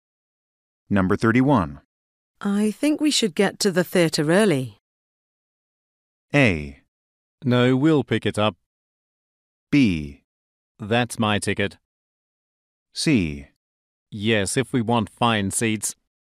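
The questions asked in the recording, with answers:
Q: I think we should get to the theater early.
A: C: Yes, if we want fine seats.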